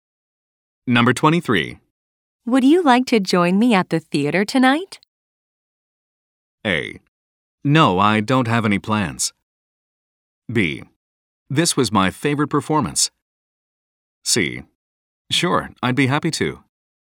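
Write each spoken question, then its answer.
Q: Would you like to join me at the theater tonight?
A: C: Sure, I'd be happy to.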